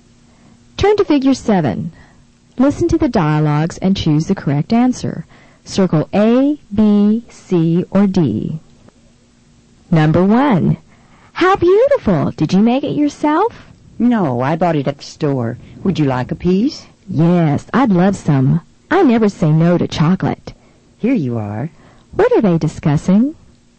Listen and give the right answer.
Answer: Number one is B, cake.